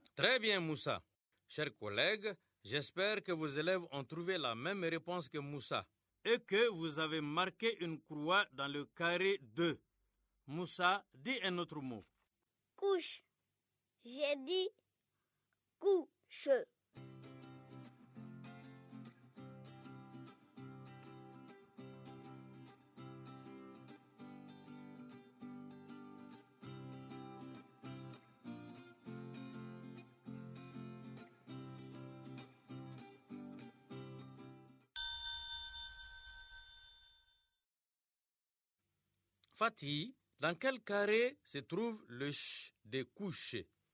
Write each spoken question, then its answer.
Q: Fatih, dans quel carré se trouve le « ch » de « couche » ?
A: Dans le carré 2, parce que le son « ch » est dans la deuxième syllabe.